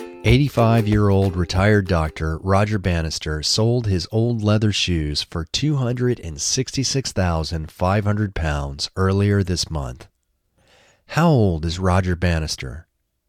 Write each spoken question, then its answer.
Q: How old is Roger Bannister?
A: Roger Bannister is 85 years old.